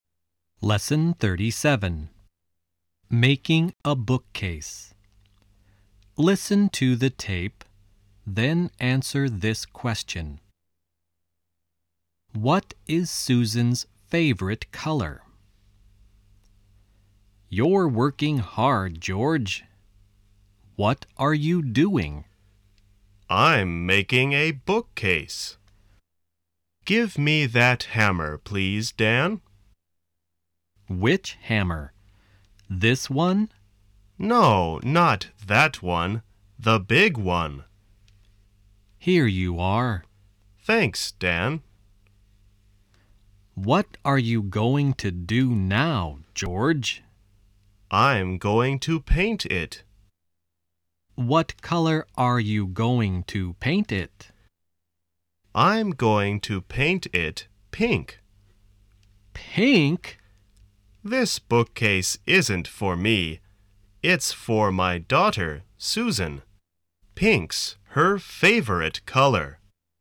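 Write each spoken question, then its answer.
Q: What is Susan's favorite color?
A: Pink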